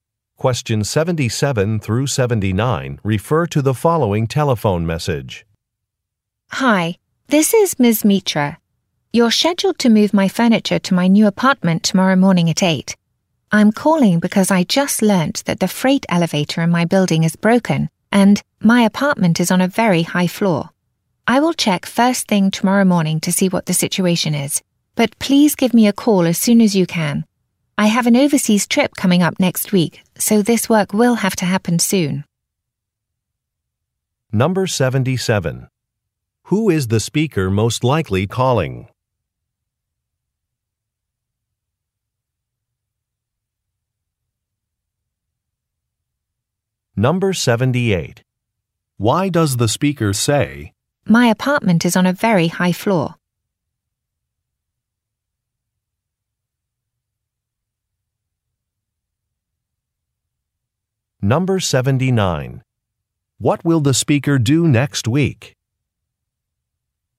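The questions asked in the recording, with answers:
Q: Who is the speaker most likely calling?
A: A moving company

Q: What will the speaker do next week?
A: Go on an overseas trip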